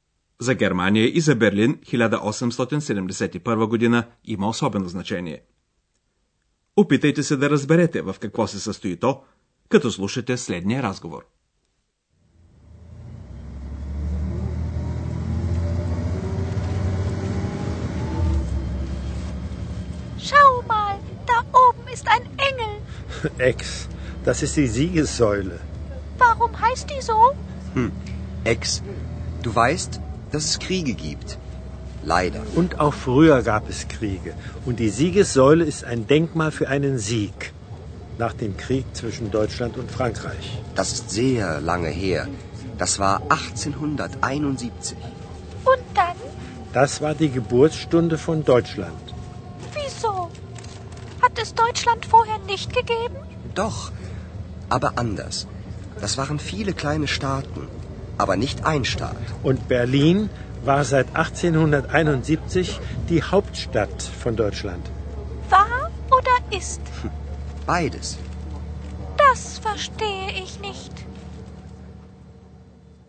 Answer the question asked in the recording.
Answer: През 1871 година завършва войната между Франция и Прусия – Това е същевременно раждането на Германия като цялостна държава.